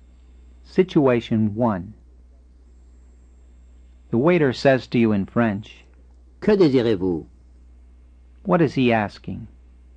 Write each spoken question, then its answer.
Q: What is he asking?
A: He's asking, What do you wish?